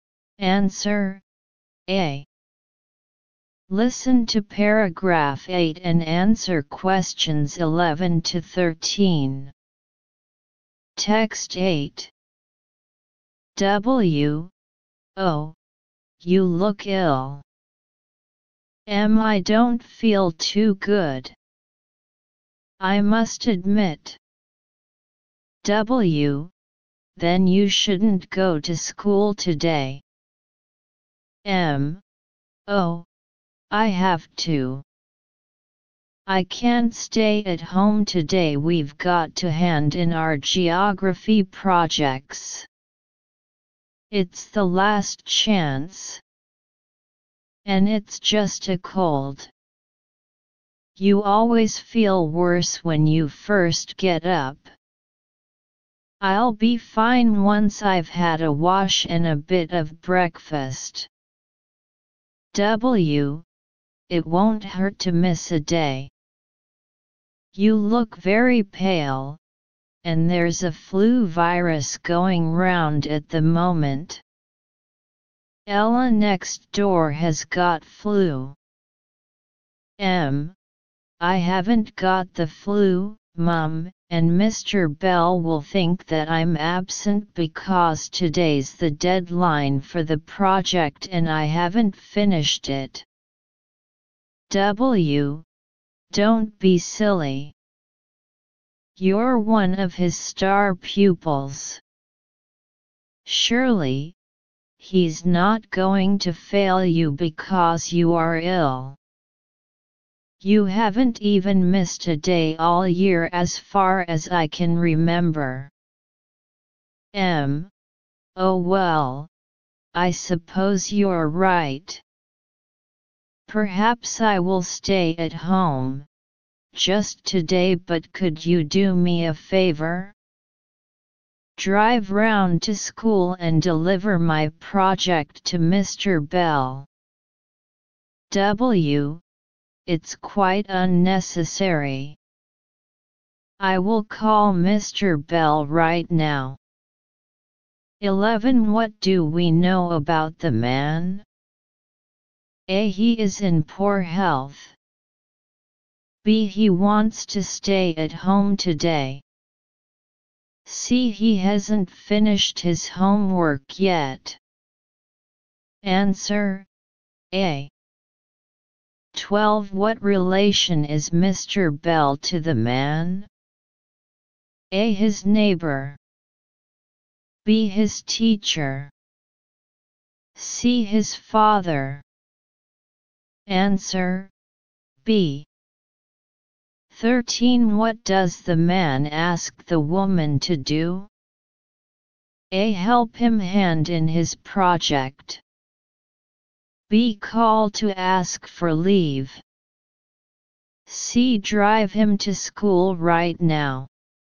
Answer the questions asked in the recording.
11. A.
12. B.
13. A.